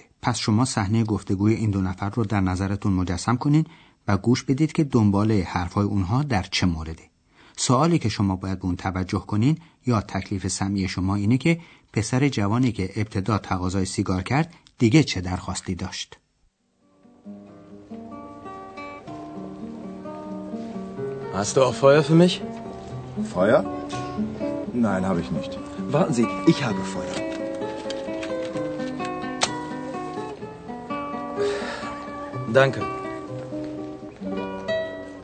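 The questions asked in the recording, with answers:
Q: پسر جوانی که ابتدا تقاضای سیگار کرد دیگه چه درخواستی داشت؟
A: آتش (کبریت یا فندک)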